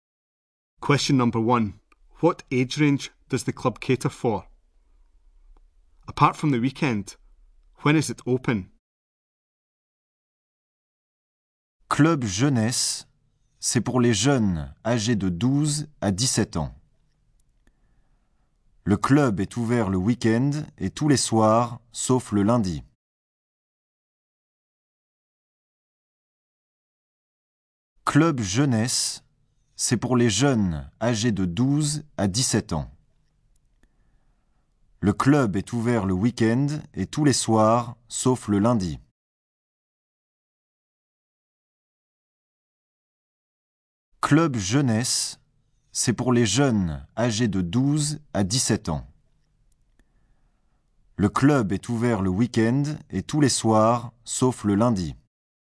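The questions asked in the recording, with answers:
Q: What age range does the club cater for?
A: 12 to 17 year olds

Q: Apart from the weekend, when is it open?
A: Every evening except Monday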